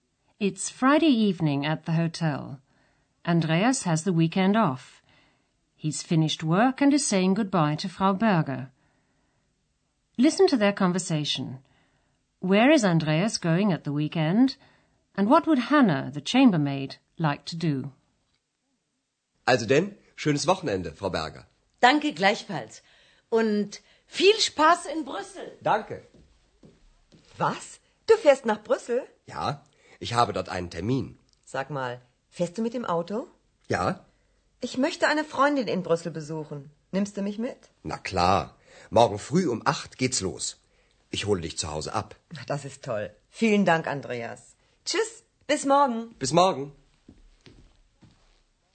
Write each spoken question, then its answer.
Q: Where is Andreas going at the weekend?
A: Andreas is going to Brussels at the weekend.

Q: And what would Hannah, the chambermaid, like to do?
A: Hannah would like to go with him because she wants to visit a girlfriend who lives there.